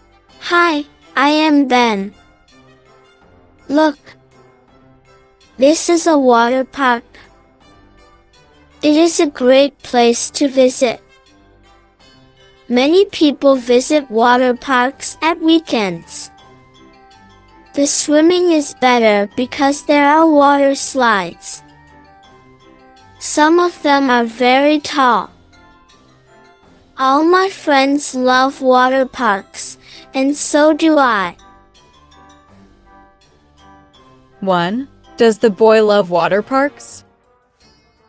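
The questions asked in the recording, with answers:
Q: Does the boy love water parks?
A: Yes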